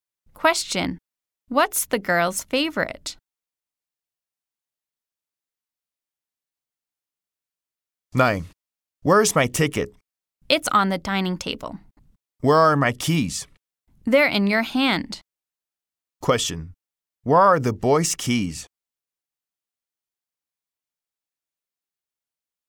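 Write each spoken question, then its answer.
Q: Where are the boys' keys?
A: In his hand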